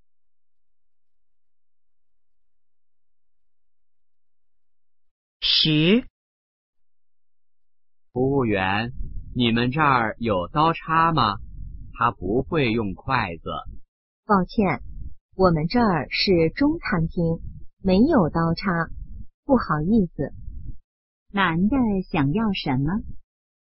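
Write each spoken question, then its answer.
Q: 男的想要什么?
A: 刀叉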